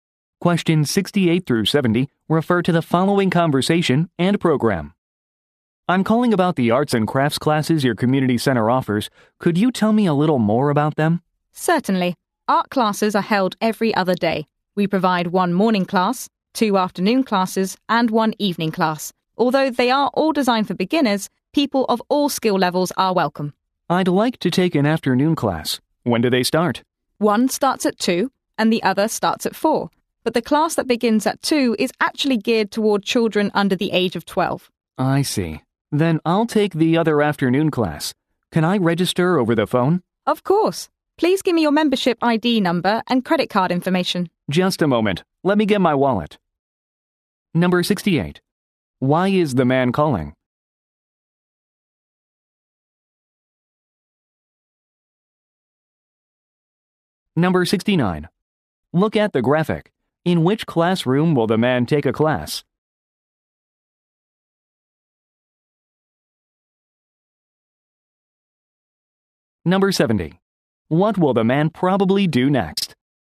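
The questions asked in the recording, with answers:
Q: Why is the man calling?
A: To ask about arts and crafts classes

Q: What will the man probably do next?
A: Give his membership ID and credit card information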